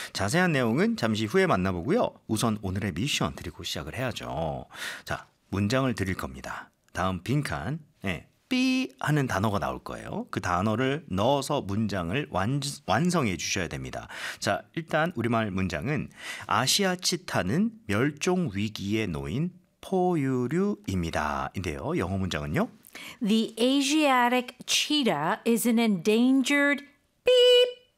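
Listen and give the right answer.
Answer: mammal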